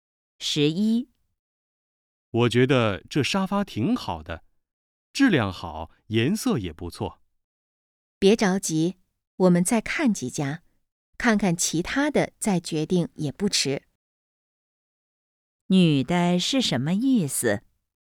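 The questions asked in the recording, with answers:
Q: 女的是什么意思?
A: 再看几家再决定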